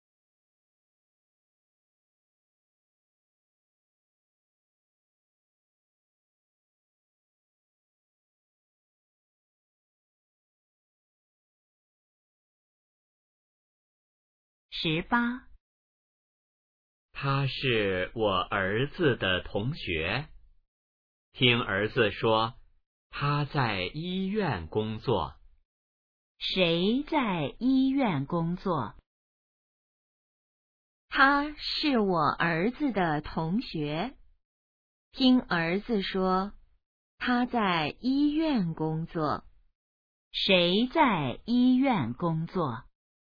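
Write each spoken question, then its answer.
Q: 谁在医院工作?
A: 儿子的同学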